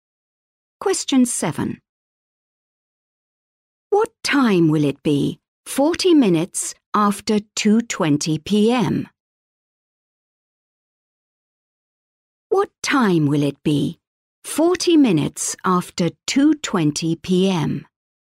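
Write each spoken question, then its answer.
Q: What time will it be 40 minutes after 2:20 p.m.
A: 3:00 p.m.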